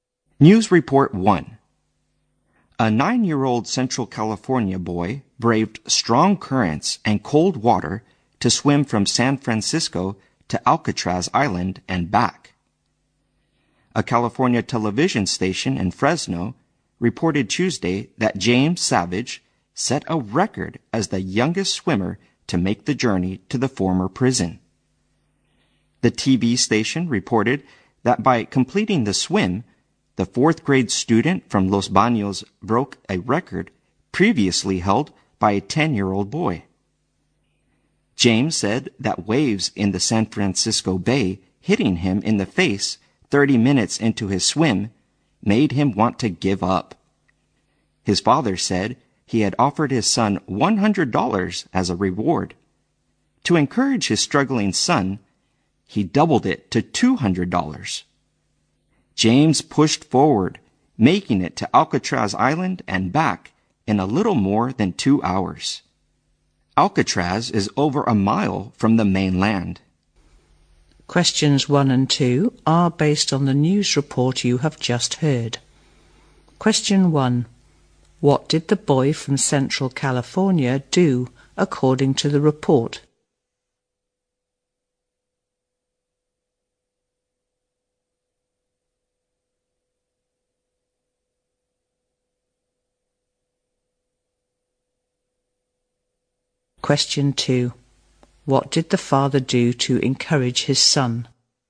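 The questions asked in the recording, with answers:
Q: What did the boy from Central California do according to the report?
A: He swam from San Francisco to Alcatraz Island and back, setting a record as the youngest swimmer to do so.

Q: What did the father do to encourage his son?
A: He doubled the reward from $100 to $200.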